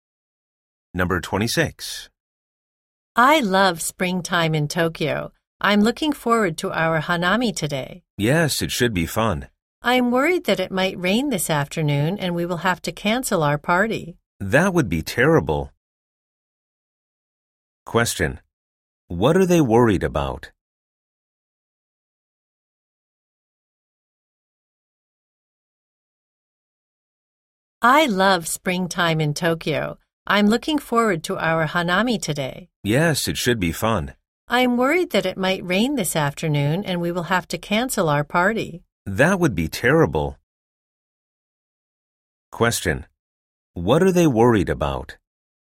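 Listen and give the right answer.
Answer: That it might rain and they will have to cancel their party.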